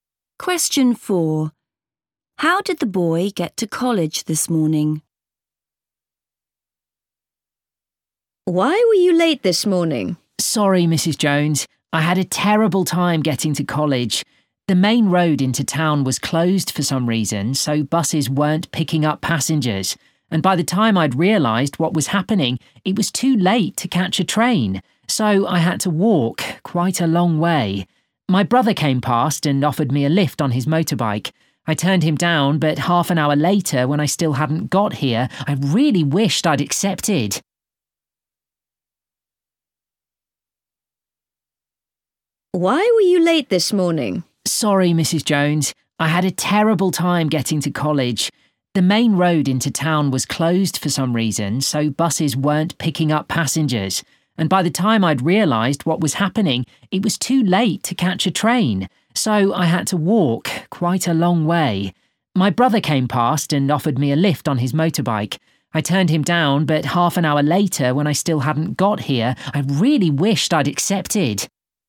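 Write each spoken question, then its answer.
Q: How did the boy get to college this morning?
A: he walked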